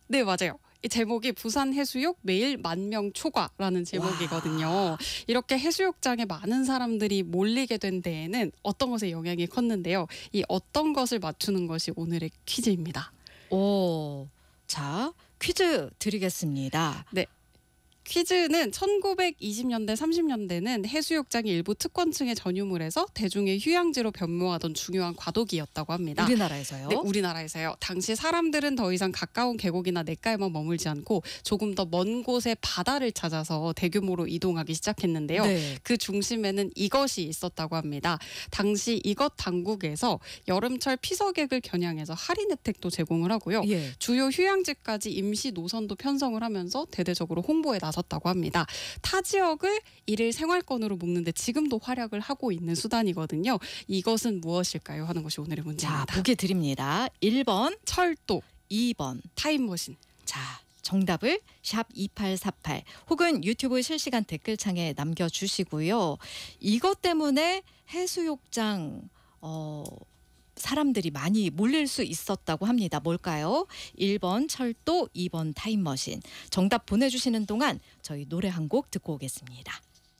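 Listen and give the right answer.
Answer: 1: 철도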